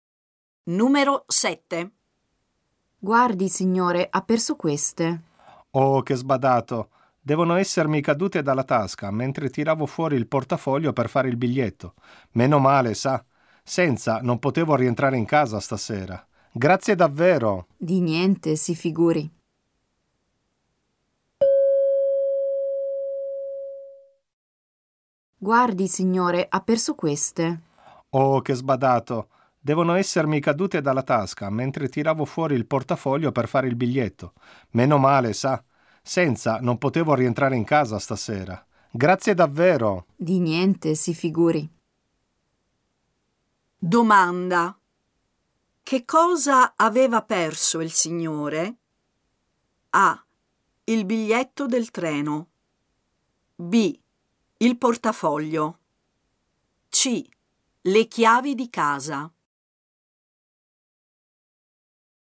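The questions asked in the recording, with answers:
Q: Domanda. Che cosa aveva perso il signore?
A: C: Le chiavi di casa.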